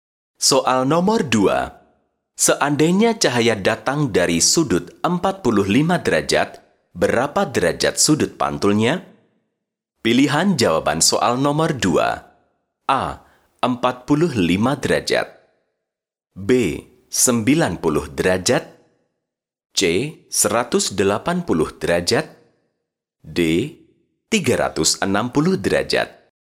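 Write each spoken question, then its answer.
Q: Seandainya cahaya datang dari sudut 45 derajat, berapa derajat sudut pantulnya?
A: A: 45 derajat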